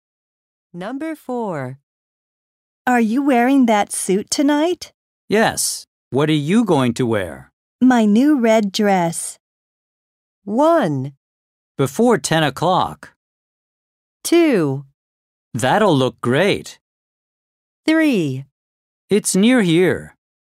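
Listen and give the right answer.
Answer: 2: That'll look great.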